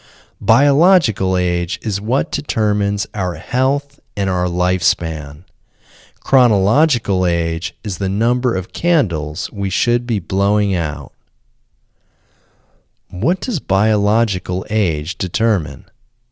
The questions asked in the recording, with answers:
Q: What does biological age determine?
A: Biological age determines our health and our lifespan.